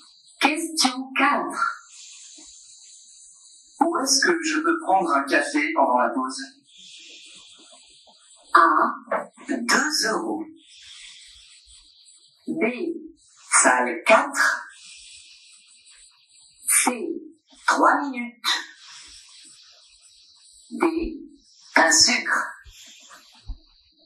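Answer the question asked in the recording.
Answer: B: Salle 4.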